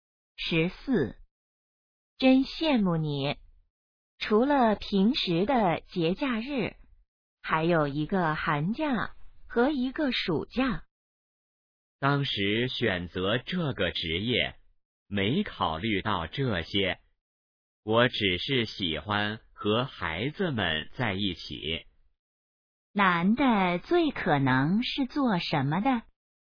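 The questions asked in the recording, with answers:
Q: 男的最可能是做什么的?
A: 老师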